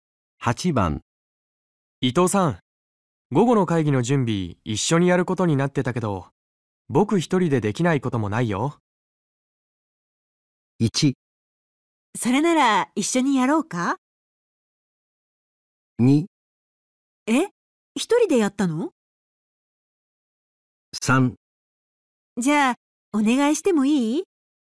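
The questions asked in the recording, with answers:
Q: 伊藤さん午後の会議の準備一緒にやることになってたけど僕一人でできないこともないよ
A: 3: じゃあお願いしてもいい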